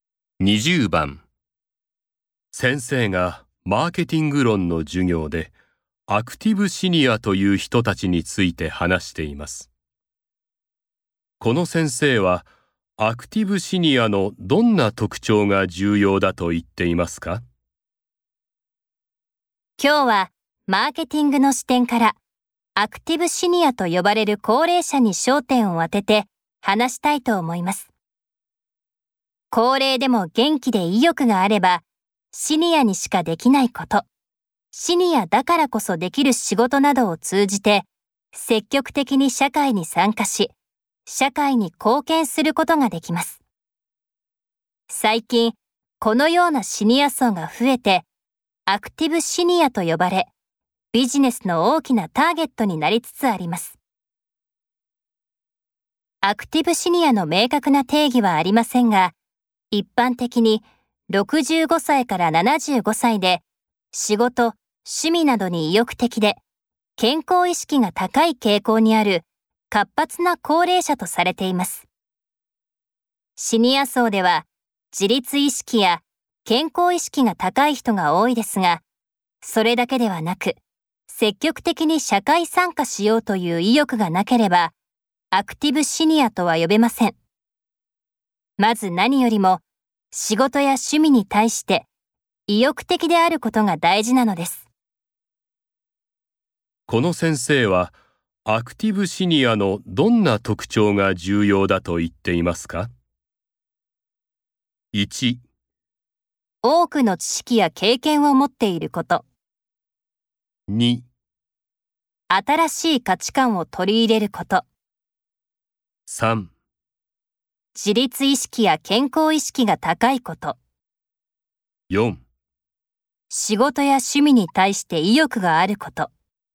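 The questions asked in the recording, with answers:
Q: この先生はアクティブシニアのどんな特徴が重要だと言っていますか?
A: 4: 仕事や趣味に対して意欲があること。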